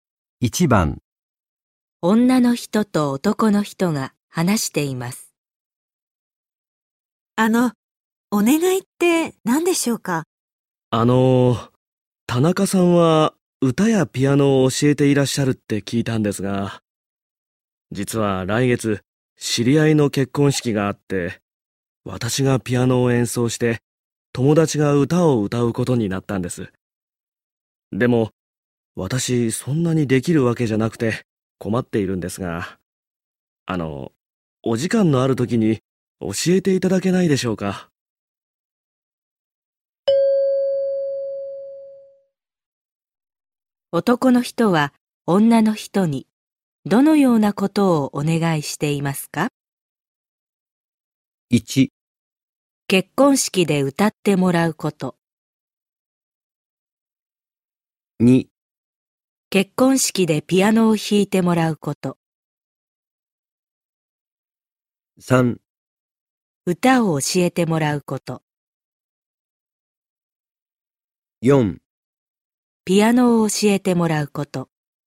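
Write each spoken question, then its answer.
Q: 男の人は女の人にどのようなことをお願いしていますか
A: 4: ピアノを教えてもらうこと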